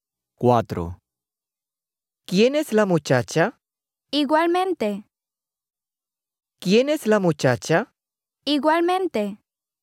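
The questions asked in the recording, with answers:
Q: ¿Quién es la muchacha?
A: B: not logical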